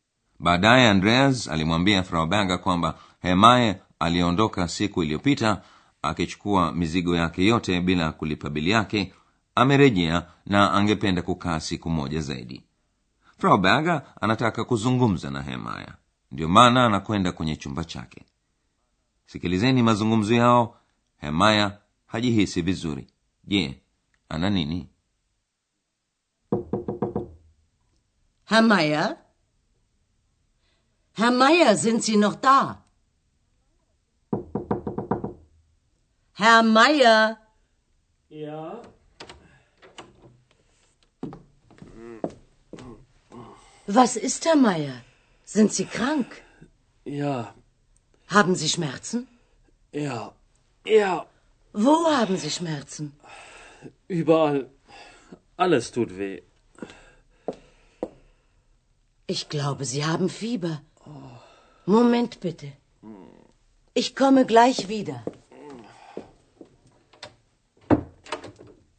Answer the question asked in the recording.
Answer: hemaya yuko kitandani na ana maumivu